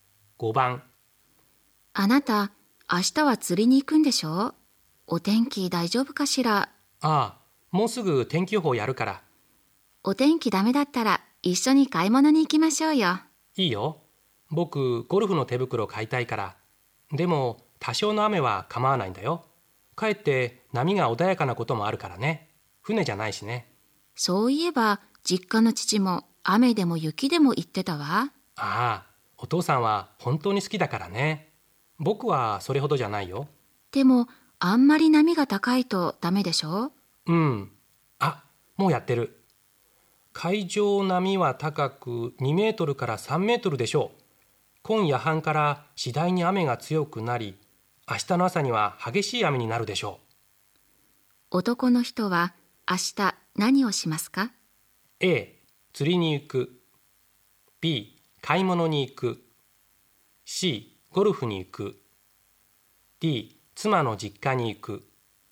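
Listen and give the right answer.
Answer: B: 買い物に行く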